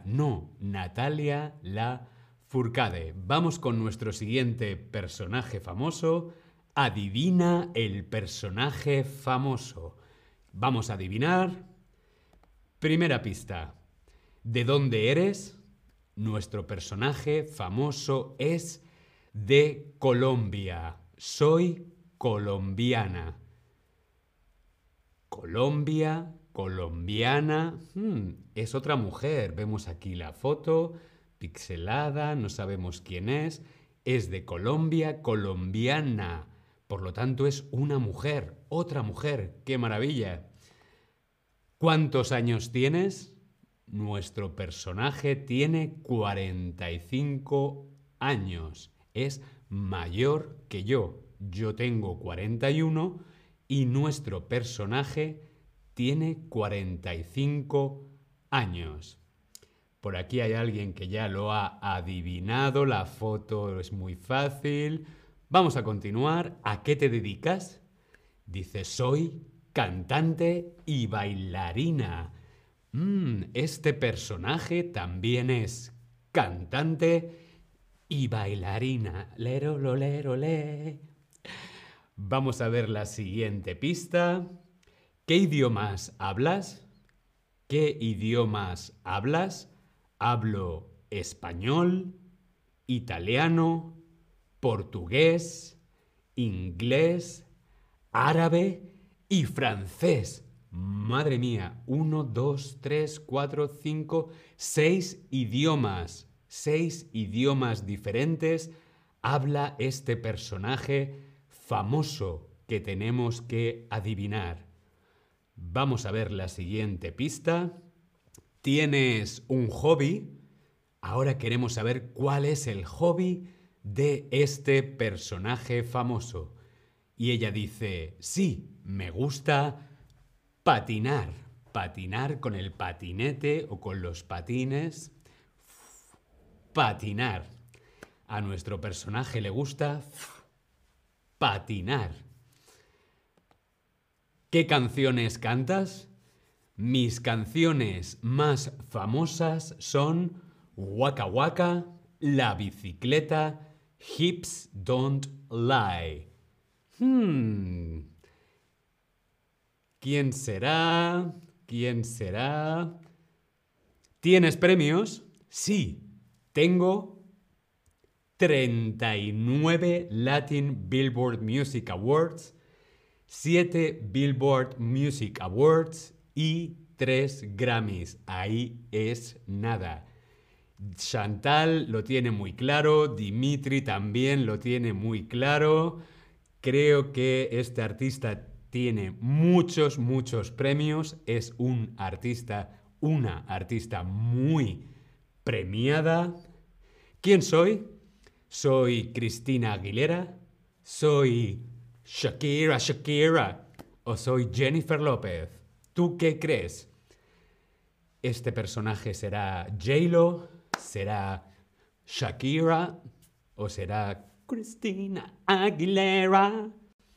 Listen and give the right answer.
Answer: Soy Shakira.